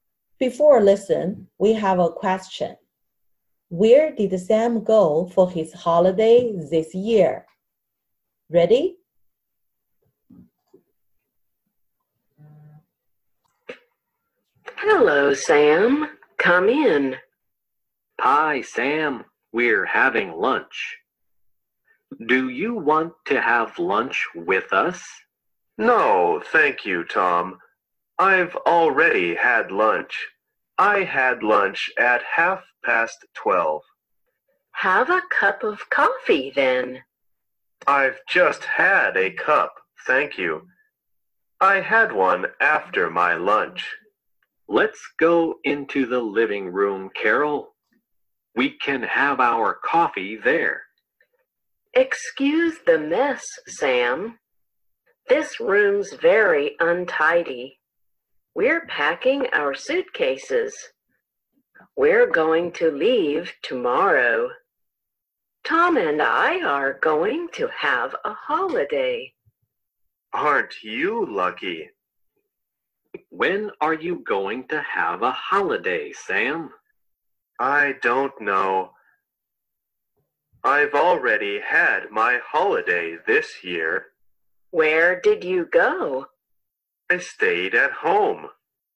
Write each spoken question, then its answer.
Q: Where did Sam go for his holiday this year?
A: Yes, he stayed at home.